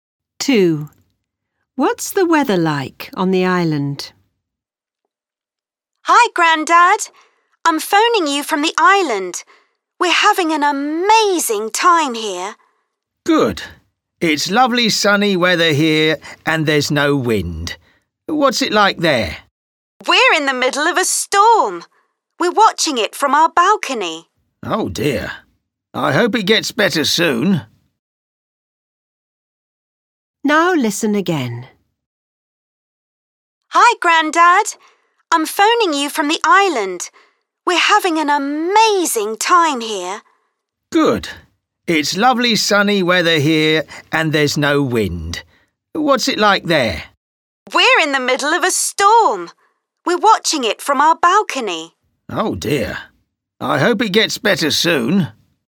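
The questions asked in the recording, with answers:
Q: What's the weather like on the island?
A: Stormy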